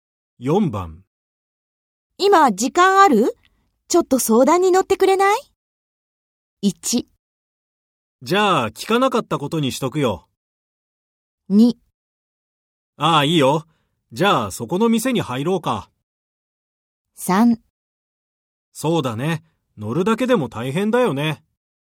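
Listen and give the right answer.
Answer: 2: ああいいよ。じゃあそこの店に入ろうか。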